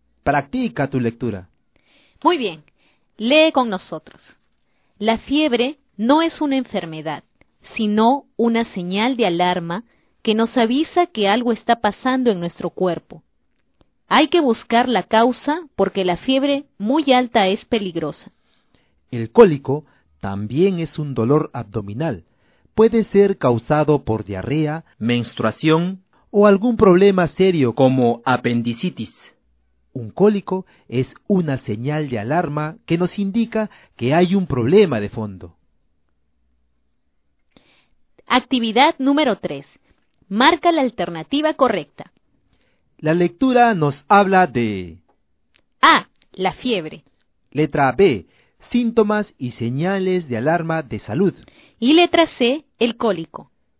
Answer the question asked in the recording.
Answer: la respuesta correcta es la alternativa B, síntomas y señales de alarma de salud.